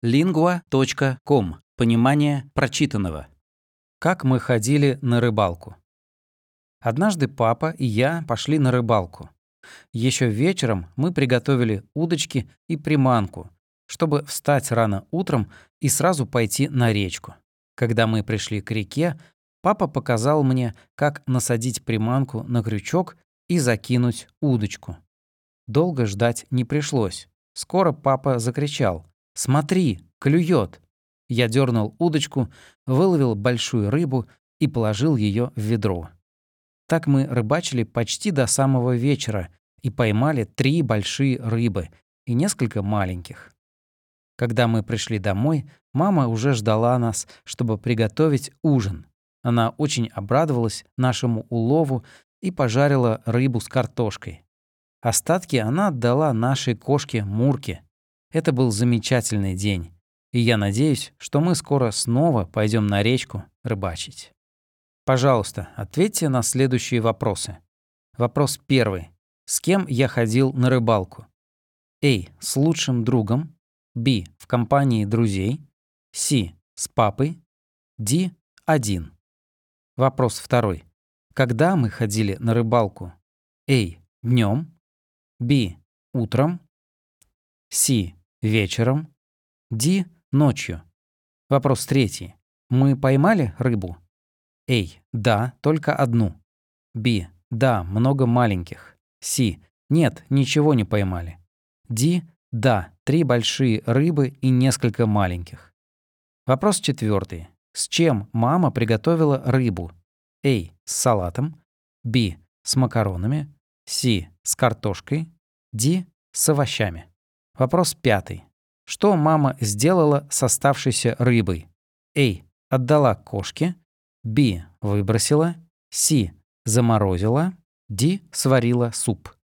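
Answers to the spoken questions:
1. C: С папой.
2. Б: Утром.
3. Д: Да, 3 большие рыбы и несколько маленьких.
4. С: С картошкой.
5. А: Отдала кошке.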